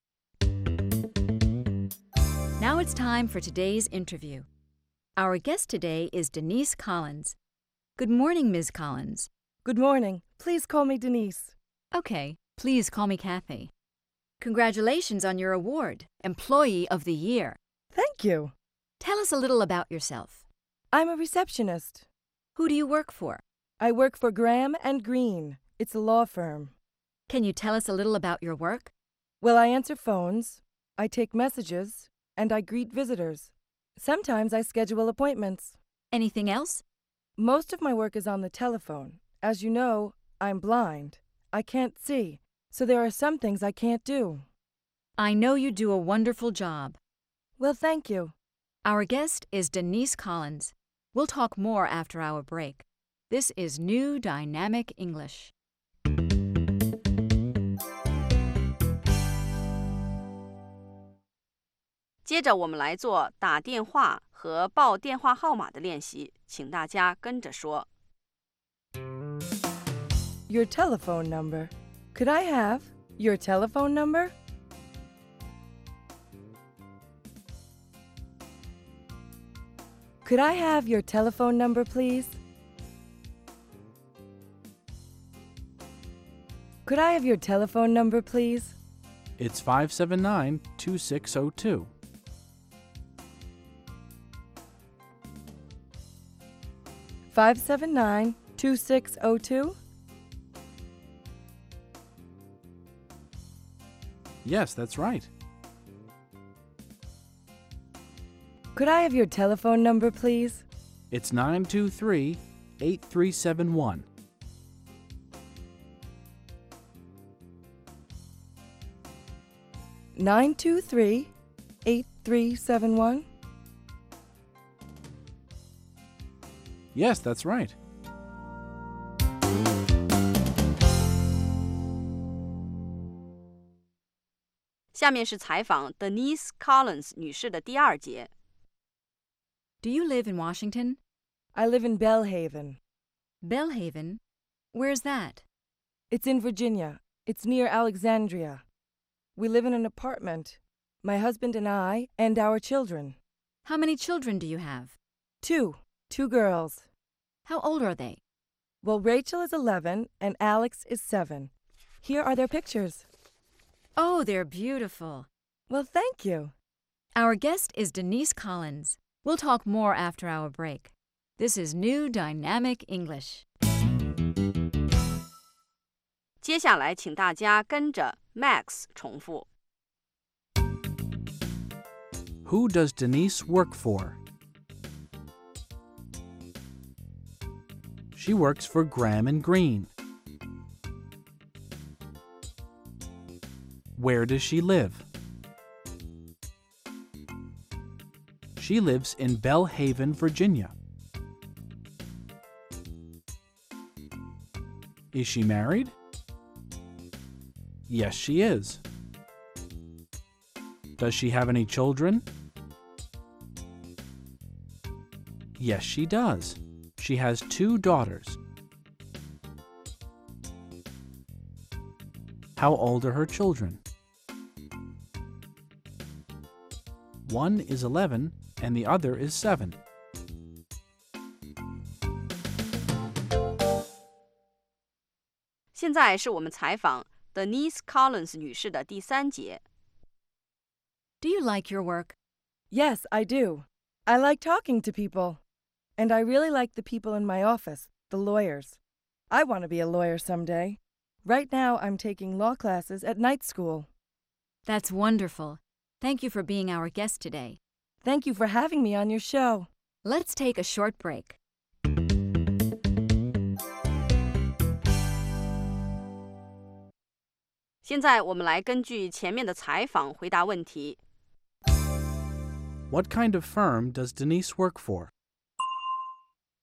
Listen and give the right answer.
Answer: She works for a law firm.